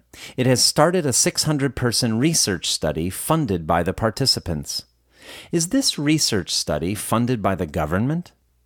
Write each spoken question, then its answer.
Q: Is this research study funded by the government?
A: No, this research study isn't funded by the government.